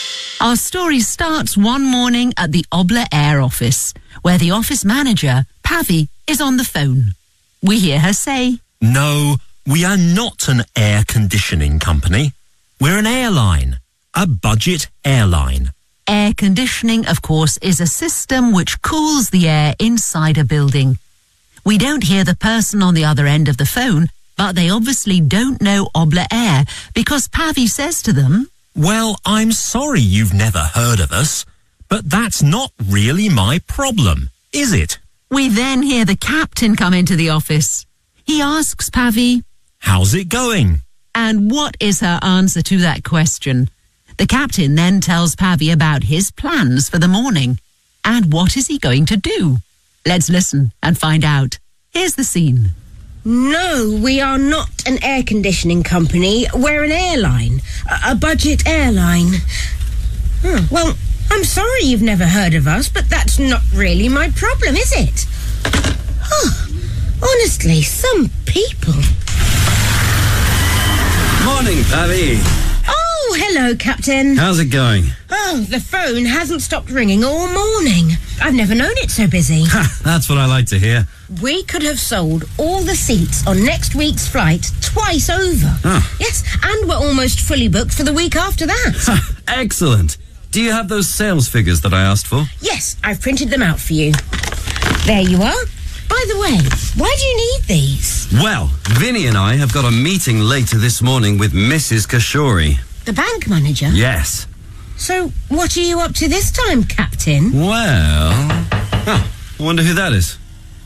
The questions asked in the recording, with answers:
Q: And what is her answer to that question?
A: The phone hasn't stopped ringing all morning.